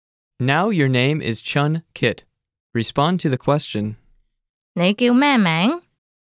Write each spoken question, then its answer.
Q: 你叫咩名?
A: 我叫俊杰。